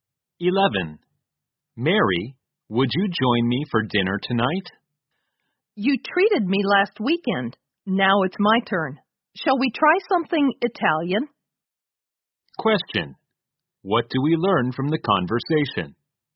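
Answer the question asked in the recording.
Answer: The man invites Mary to dinner (perhaps Italian) because she treated him last weekend and it's his turn.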